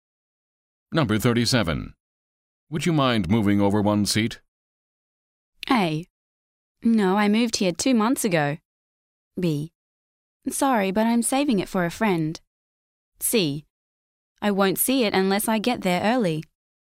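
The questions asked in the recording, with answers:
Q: Would you mind moving over one seat?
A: B: Sorry, but I'm saving it for a friend.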